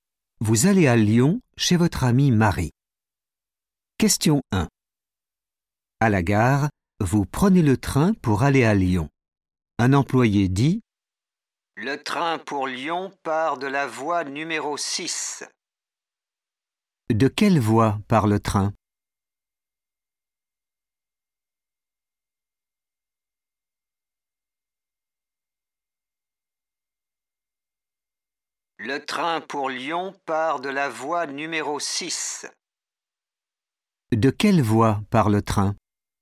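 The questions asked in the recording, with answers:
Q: De quelle voie part le train ?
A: voie numéro 6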